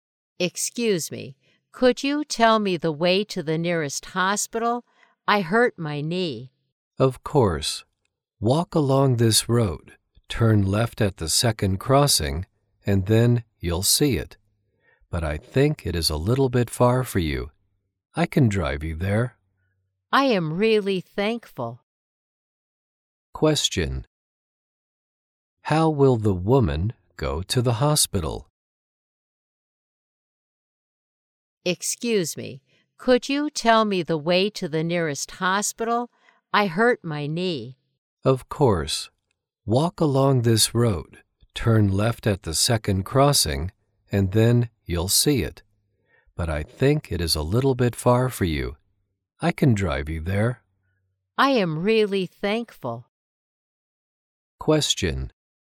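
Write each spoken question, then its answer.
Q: How will the woman go to the hospital?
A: By car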